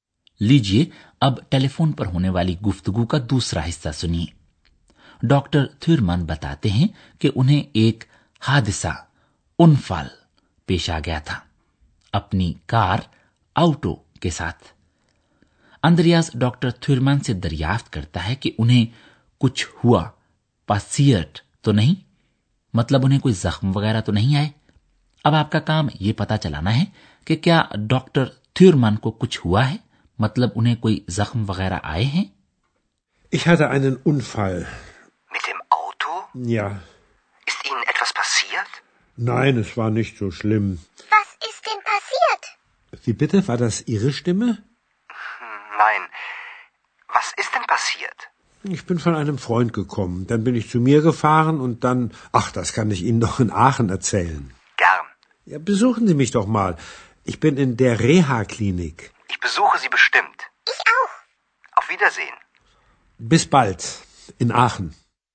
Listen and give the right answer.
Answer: doctor تھرمان کو جو بھی کچھ ہوا ہے یہ بات طے ہے کہ معاملہ زیادہ گمبھیر نہیں ہے